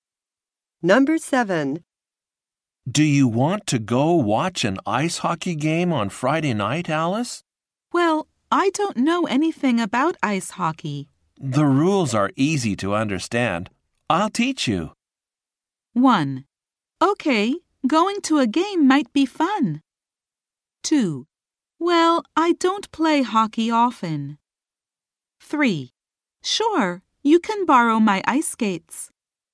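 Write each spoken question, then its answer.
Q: The rules are easy to understand.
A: 1: Okay, going to a game might be fun.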